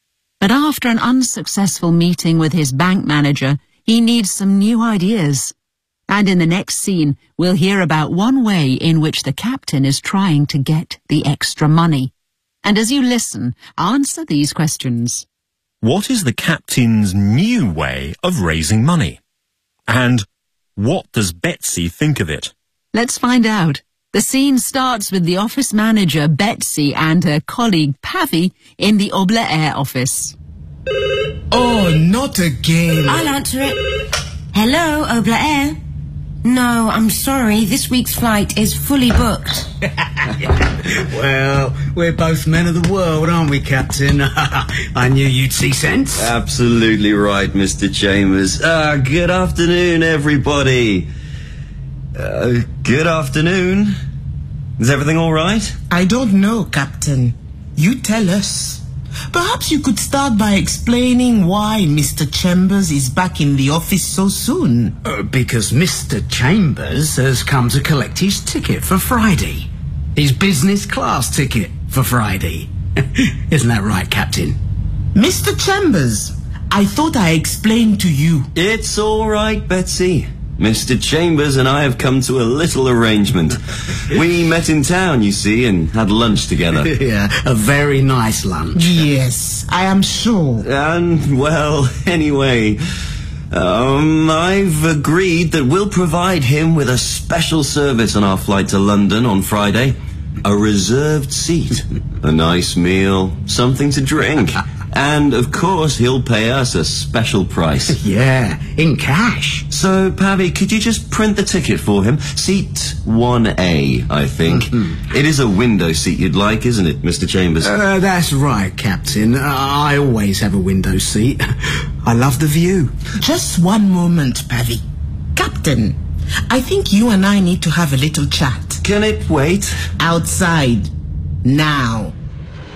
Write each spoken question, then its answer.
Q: And what does Betsy think of it?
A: She's not happy.